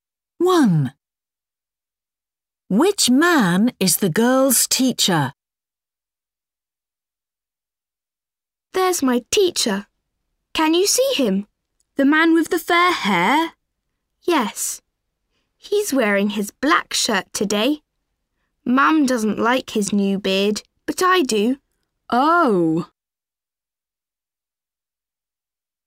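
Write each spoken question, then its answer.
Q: Which man is the girl's teacher?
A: The man with fair hair, a black shirt and a beard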